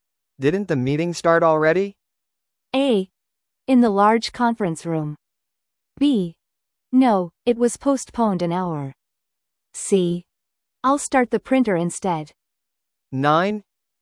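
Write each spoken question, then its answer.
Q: Didn't the meeting start already?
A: B: No, it was postponed an hour.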